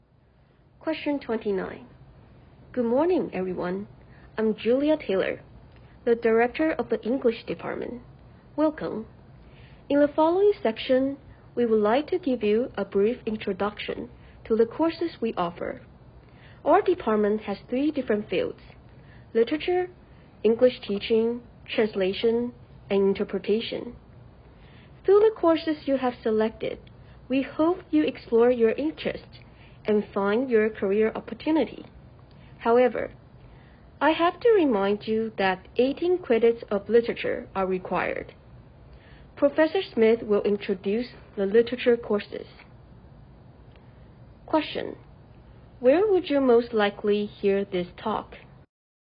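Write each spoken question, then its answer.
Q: Where would you most likely hear this talk?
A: At an English department orientation for new students at a university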